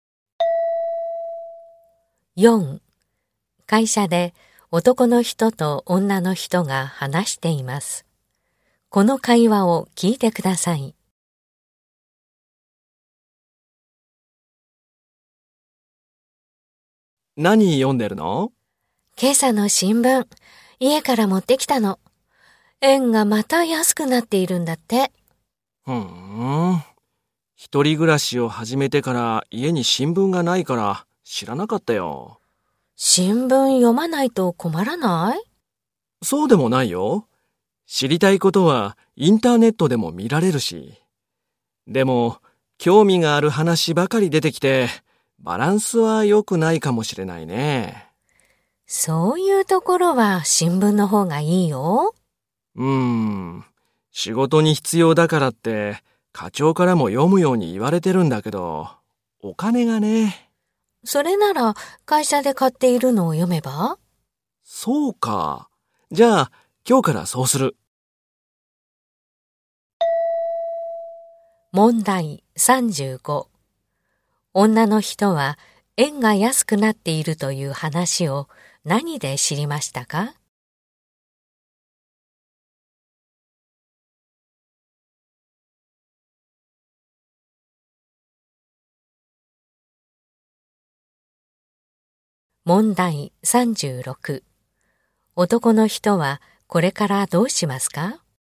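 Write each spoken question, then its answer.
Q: 女の人は円が安くなっているという話を何で知りましたか?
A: 新聞

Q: 男の人はこれからどうしますか?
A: 会社で買っている新聞を読む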